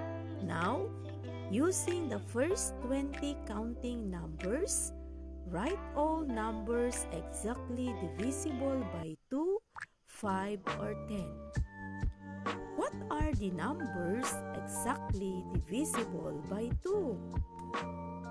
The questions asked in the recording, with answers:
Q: What are the numbers exactly divisible by 2?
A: 2, 4, 6, 8, 10, 12, 14, 16, 18, and 20 are all divisible by 2.